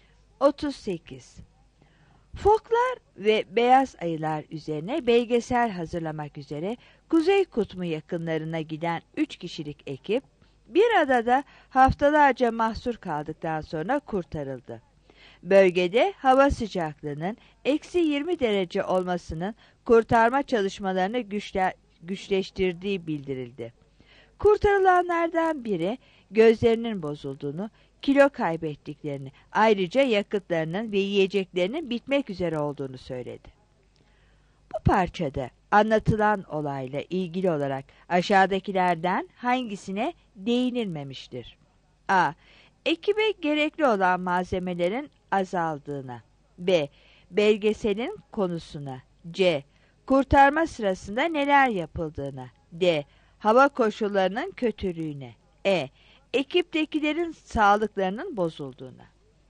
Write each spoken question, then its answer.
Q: Bu parçada anlatılan olayla ilgili olarak aşağıdakilerden hangisine değinilmemiştir?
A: 38 C